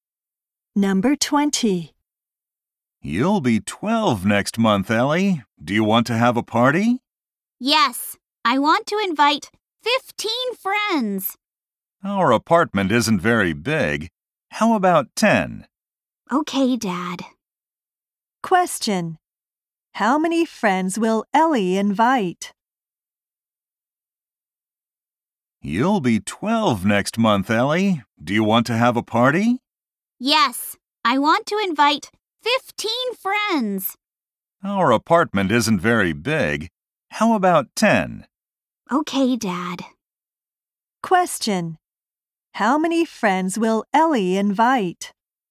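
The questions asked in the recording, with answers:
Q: How many friends will Ellie invite?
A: Ten.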